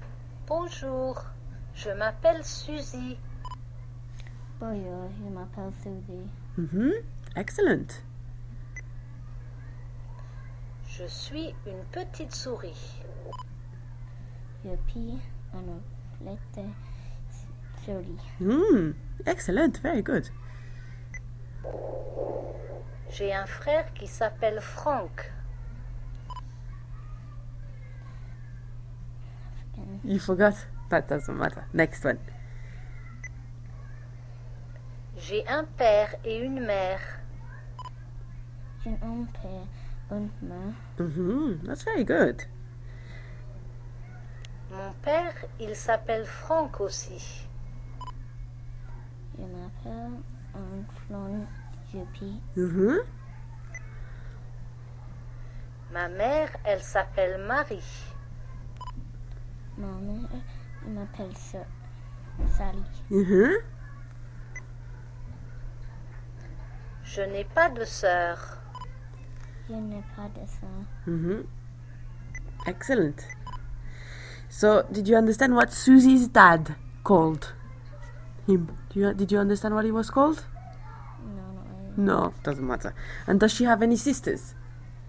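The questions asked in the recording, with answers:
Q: So, did you understand what Susie's dad called him?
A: Franck

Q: And does she have any sisters?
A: No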